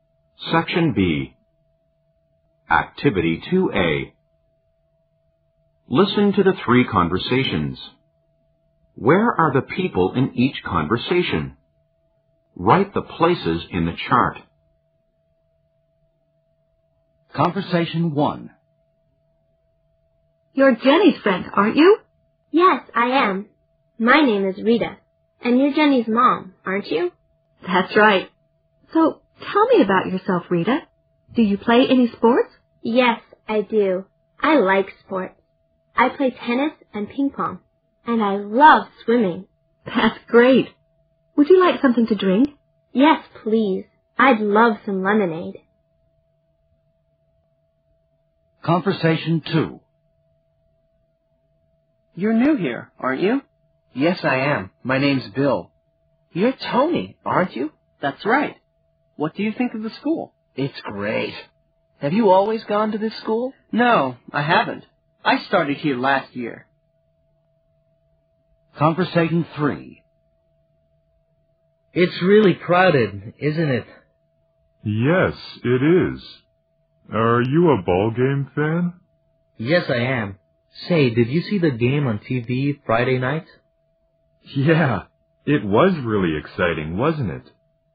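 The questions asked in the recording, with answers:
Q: Where are the people in each conversation?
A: At school

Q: Where are the people in each conversation?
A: At a ball game (stadium)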